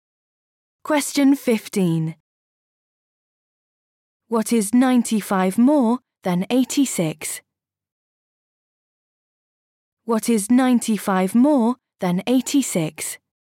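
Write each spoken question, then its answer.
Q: What is 95 more than 86?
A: 181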